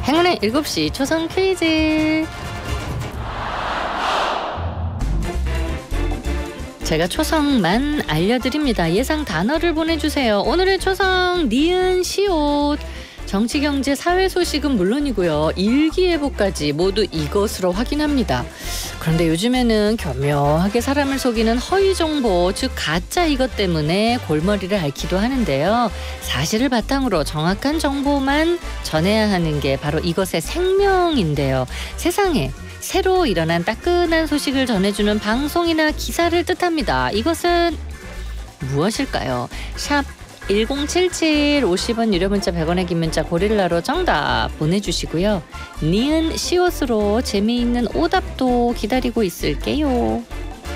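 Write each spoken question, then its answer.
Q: 이것은 무엇일까요?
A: 뉴스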